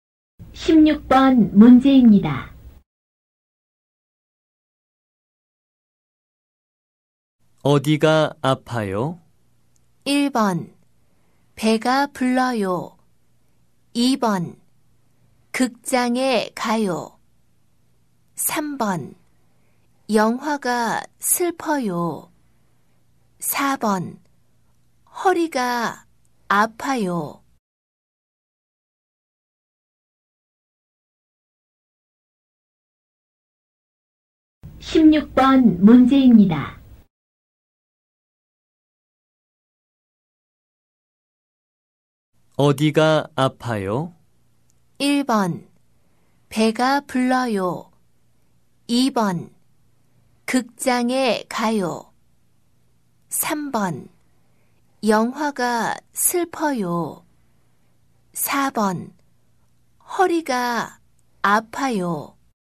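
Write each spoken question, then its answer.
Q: 어디가 아파요?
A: 4: 허리가 아파요.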